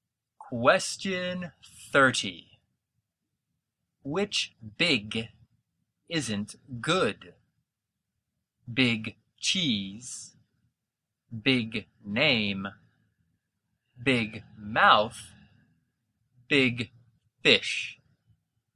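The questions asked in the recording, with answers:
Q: Which big isn't good?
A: C: big mouth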